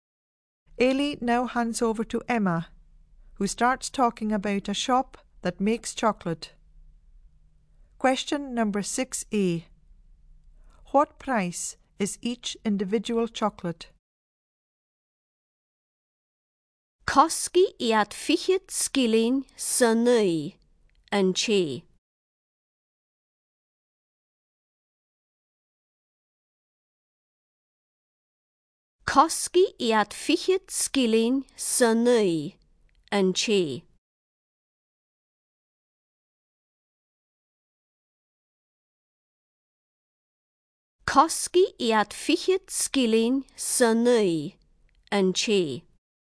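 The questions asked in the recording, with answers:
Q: What price is each individual chocolate?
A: Twenty pence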